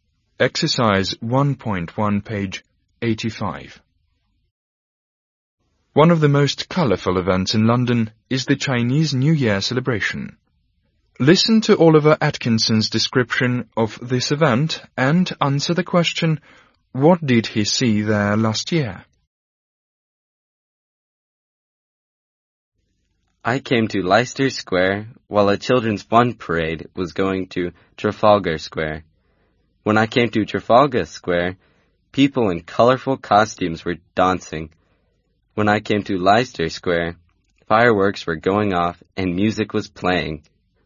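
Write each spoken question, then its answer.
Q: what did he see there last year?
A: A children's fun parade, people in colourful costumes dancing, fireworks going off and music playing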